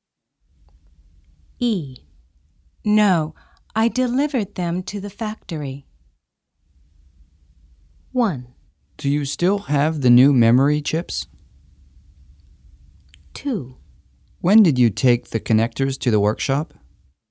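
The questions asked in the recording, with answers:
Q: No, I delivered them to the factory.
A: 1: Do you still have the new memory chips?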